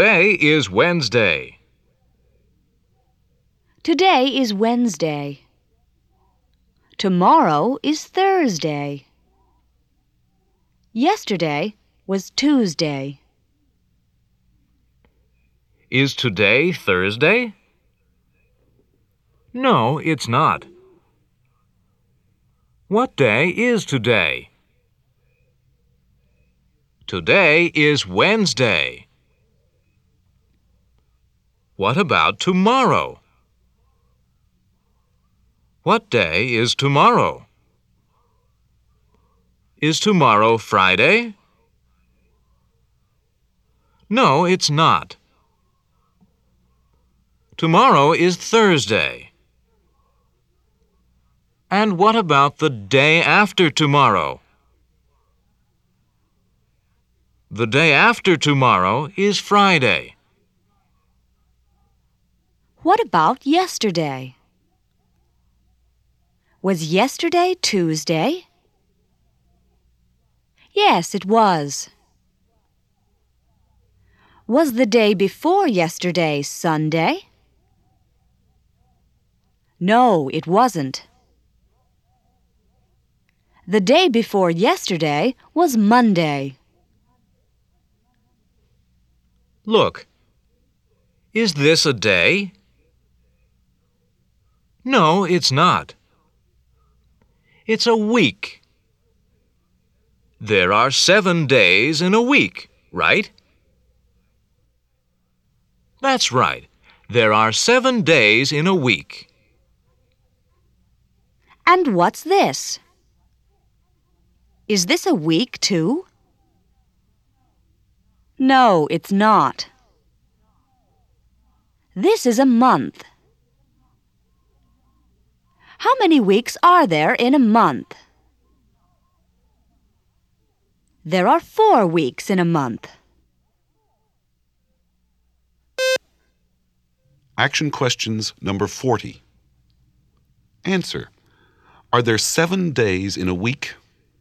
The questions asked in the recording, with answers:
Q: Are there 7 days in a week?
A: Yes, there are.